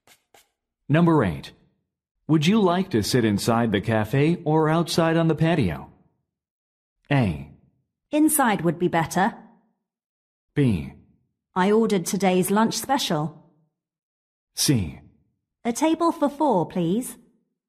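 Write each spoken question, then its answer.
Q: Would you like to sit inside the cafe or outside on the patio?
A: A: Inside would be better.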